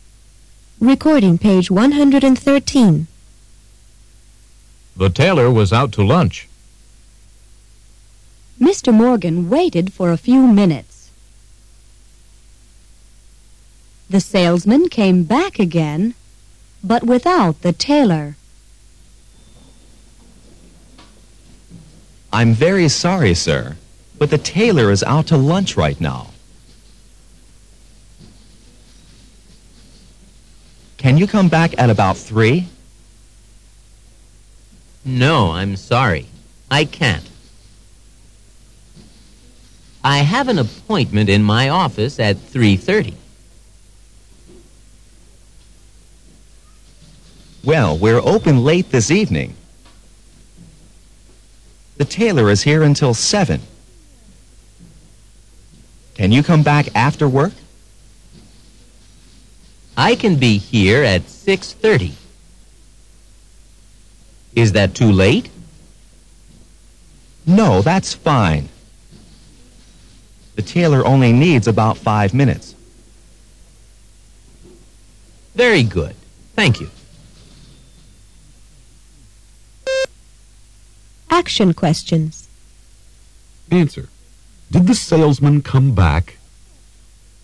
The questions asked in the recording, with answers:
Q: Did the salesman come back?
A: Yes, he did.